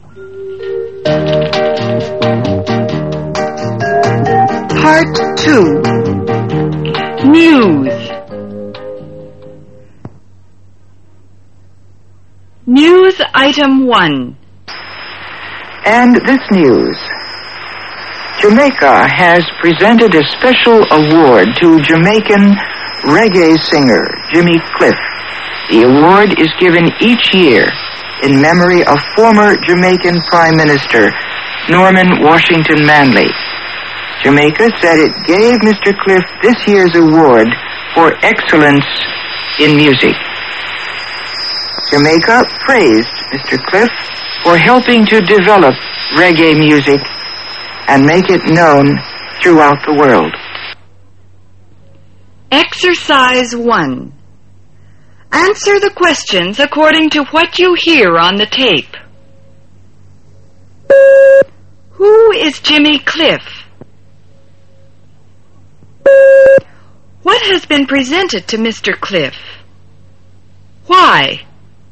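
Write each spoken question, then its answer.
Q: What has been presented to Mr. Cliff?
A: A special award (this year's Norman Washington Manley award)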